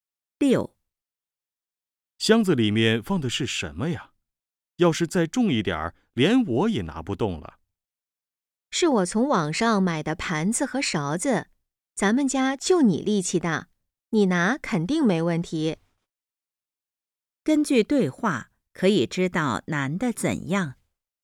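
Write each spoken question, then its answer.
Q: 根据对话,可以知道难的怎样。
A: 力气大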